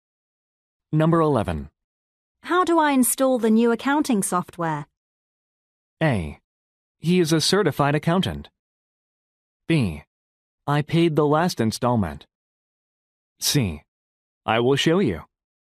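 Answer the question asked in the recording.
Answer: C: I will show you.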